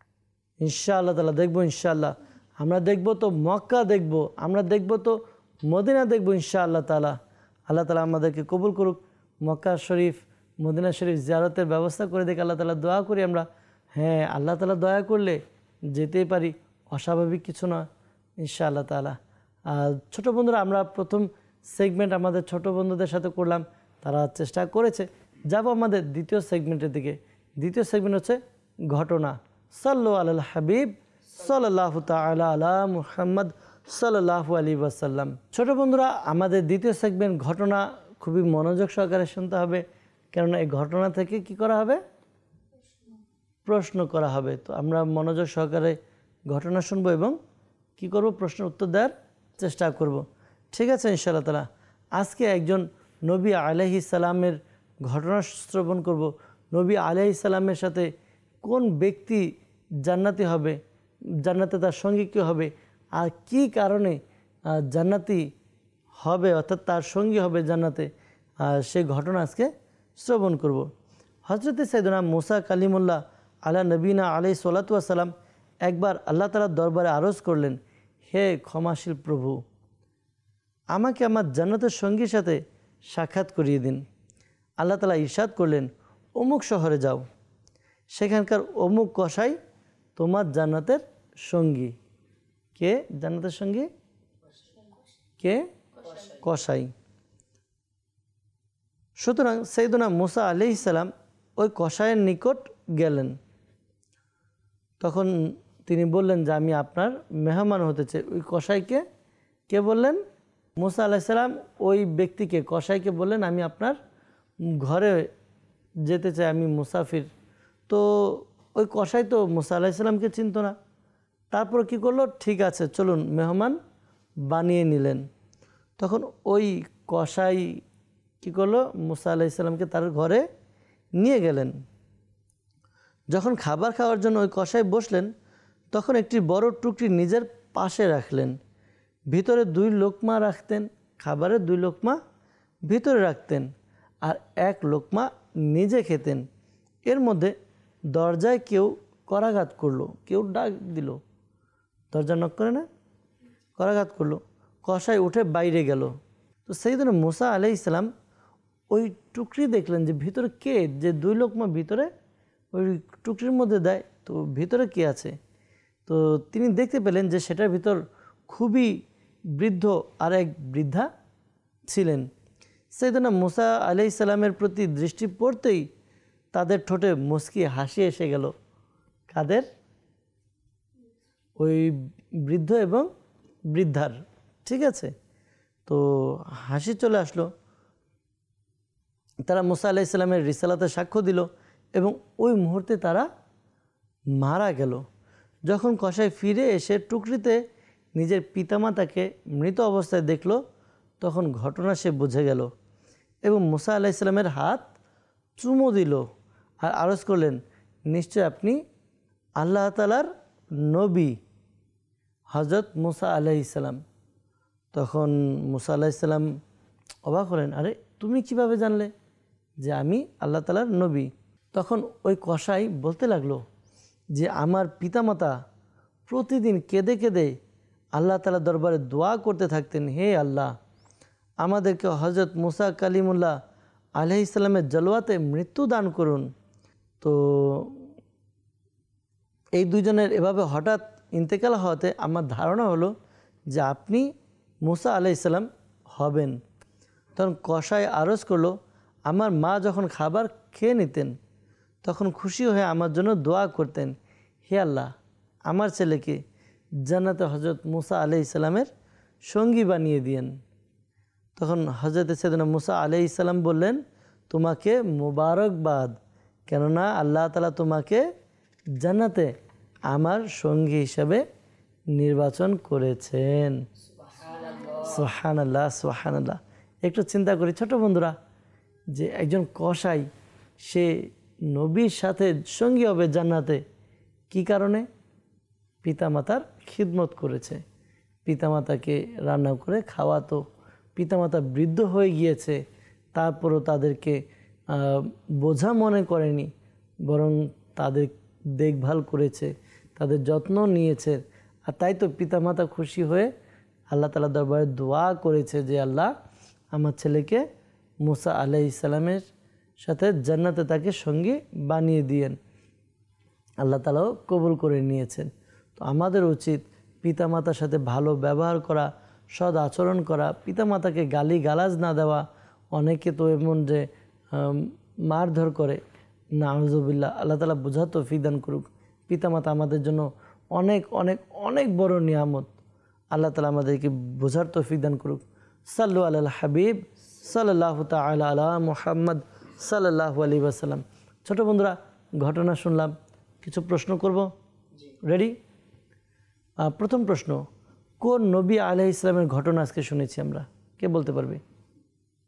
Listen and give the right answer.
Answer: হযরত মুসা কালিমুল্লাহ আলাইহিস সালামের ঘটনা।